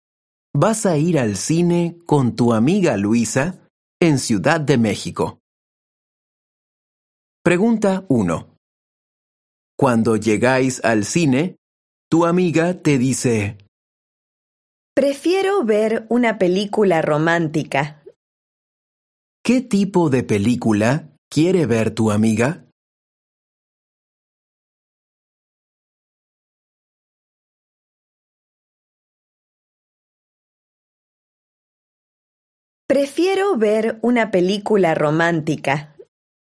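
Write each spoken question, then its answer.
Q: ¿Qué tipo de película quiere ver tu amiga?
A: una película romántica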